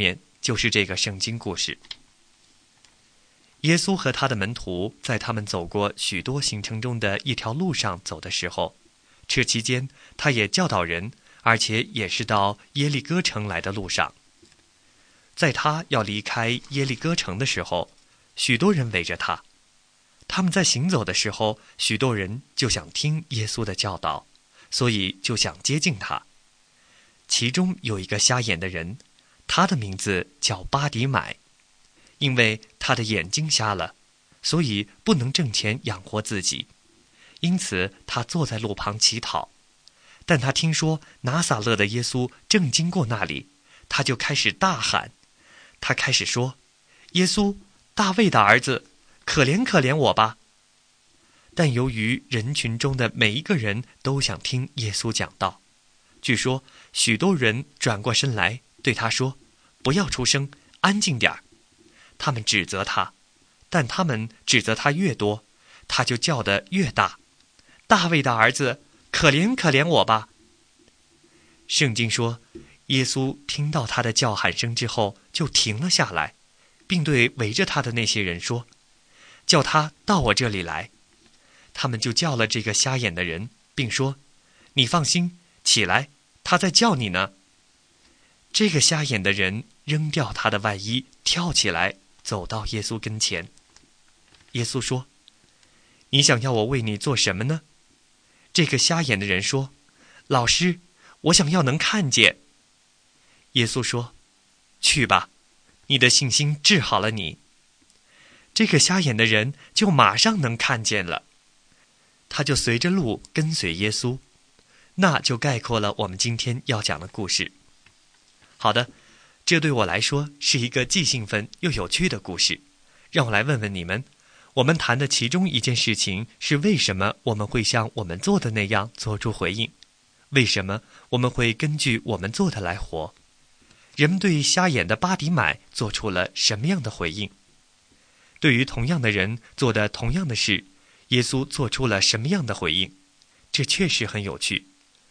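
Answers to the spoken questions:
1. 指责他,叫他不要出声、安静点儿
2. 停下来,叫人带他过来,并治好了他的眼睛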